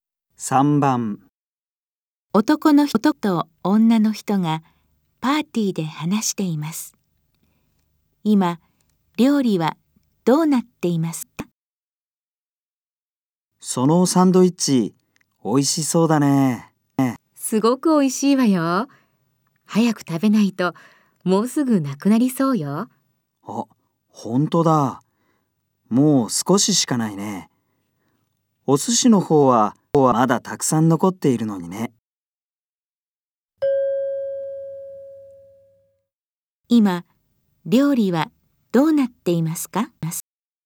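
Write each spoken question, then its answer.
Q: 今、料理はどうなっていますか?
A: サンドイッチはもう少ししかなく、お寿司はまだたくさん残っている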